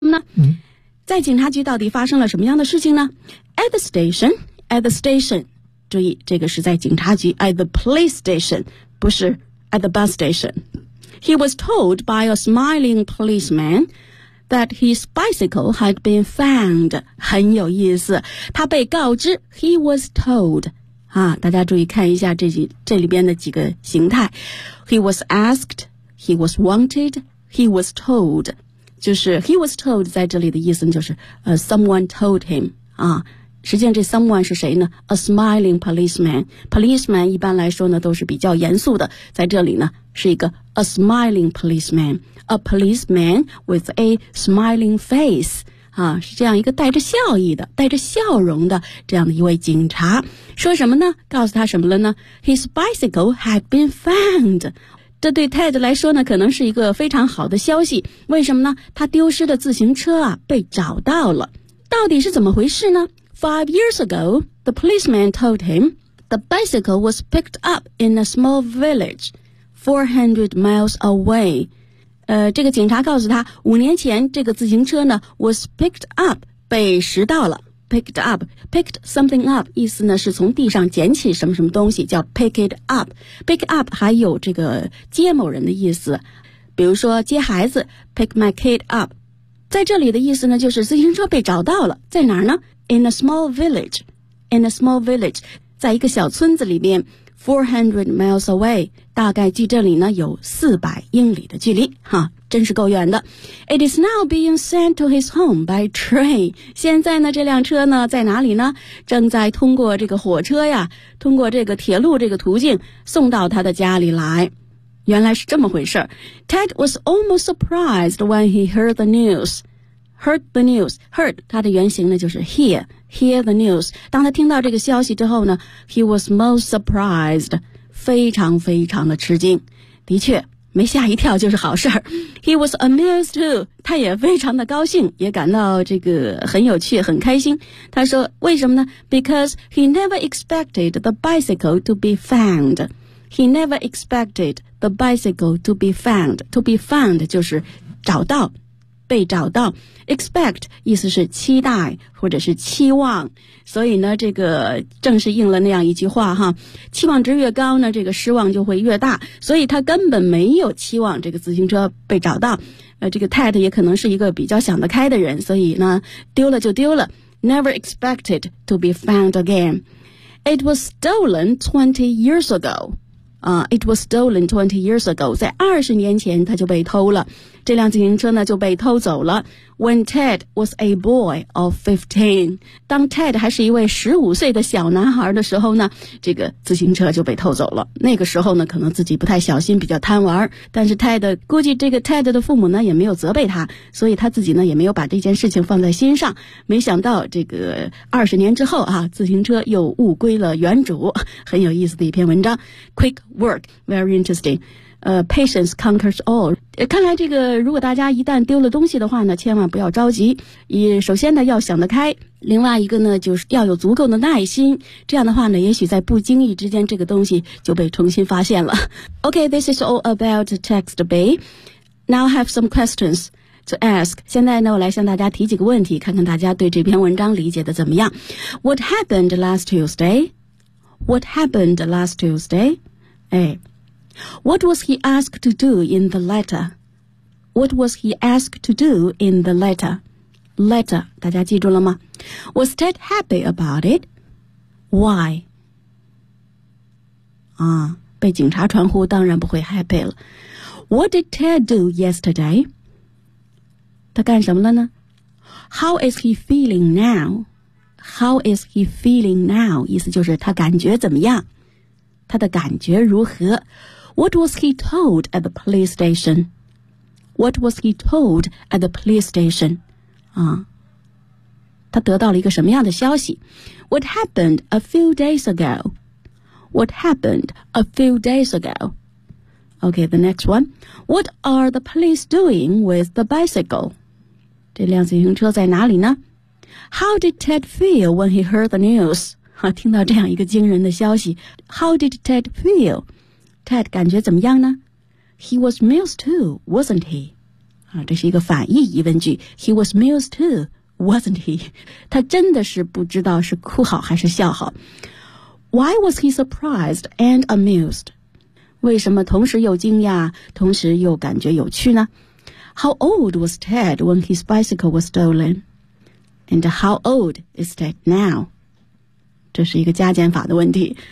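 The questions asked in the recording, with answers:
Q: What was he told at the police station?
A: His bicycle had been found.

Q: What are the police doing with the bicycle?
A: Sending it to his home by train.

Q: How did Ted feel when he heard the news?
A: He was most surprised and amused.

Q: He was amused too, wasn't he?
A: Yes, he was.

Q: Why was he surprised and amused?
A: Because he never expected the bicycle to be found.

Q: How old was Ted when his bicycle was stolen?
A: 15

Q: And how old is Ted now?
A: 35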